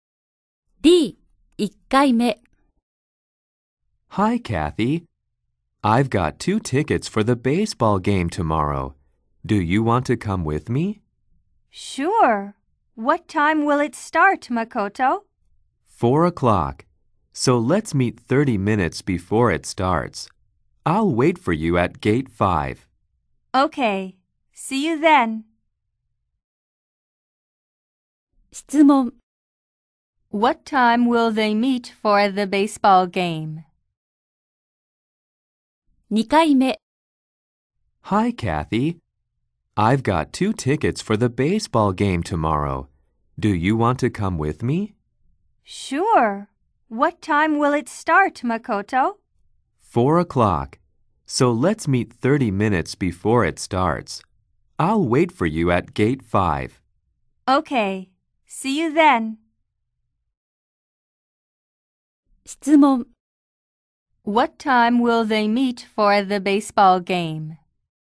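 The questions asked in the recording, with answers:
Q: What time will they meet for the baseball game?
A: At 3:30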